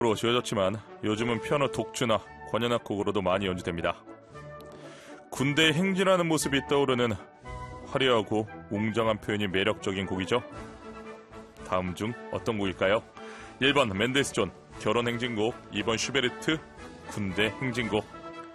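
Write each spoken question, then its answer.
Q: 다음 중 어떤 곡일까요? 1번 맨델스존 결혼행진곡, 2번 슈베르트 군대 행진곡.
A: 2: 슈베르트 군대 행진곡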